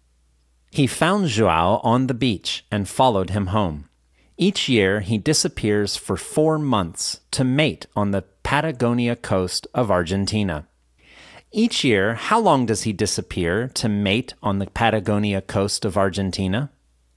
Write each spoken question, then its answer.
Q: Each year, how long does he disappear to mate on the Patagonia coast of Argentina?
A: Each year, he disappears for 4 months to mate on the Patagonia coast of Argentina.